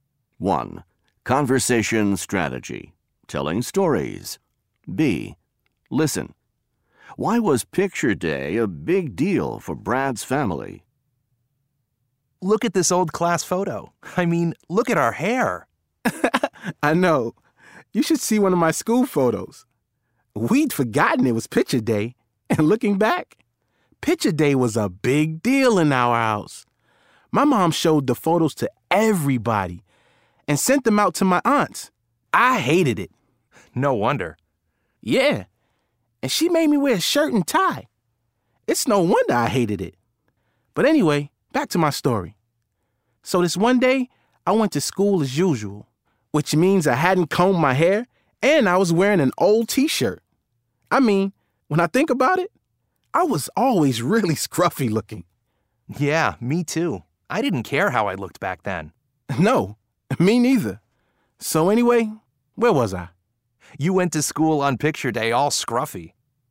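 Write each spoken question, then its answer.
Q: Why was picture day a big deal for Brad's family?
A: His mom showed the photos to everybody and sent them to his aunts.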